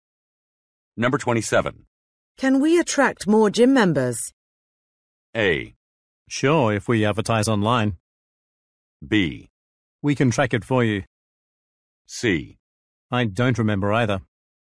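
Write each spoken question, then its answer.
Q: Can we attract more gym members?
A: A: Sure, if we advertise online.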